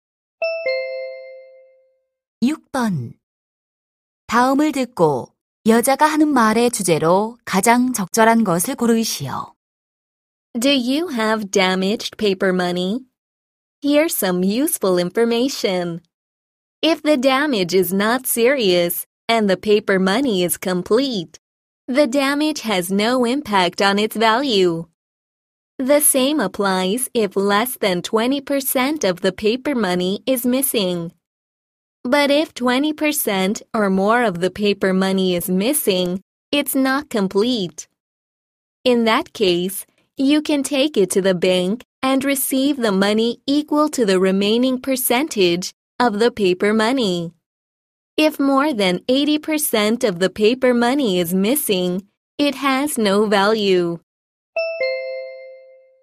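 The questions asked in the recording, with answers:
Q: 다음을 듣고 여자가 하는 말의 주제로 가장 적절한 것을 고르시오.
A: 훼손된 지폐의 가치 인정 기준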